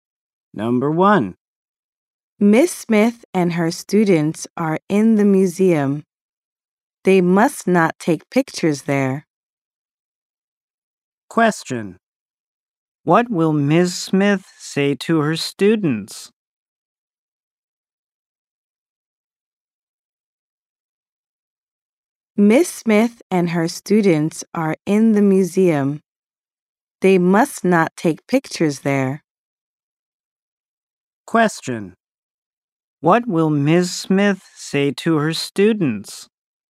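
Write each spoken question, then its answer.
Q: What will Miss Smith say to her students?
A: You must not take pictures here.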